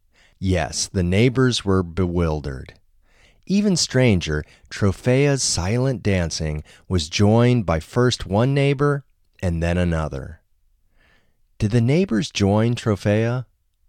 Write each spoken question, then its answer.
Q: Did the neighbors join Trofea?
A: Yes, the neighbors joined Trofea.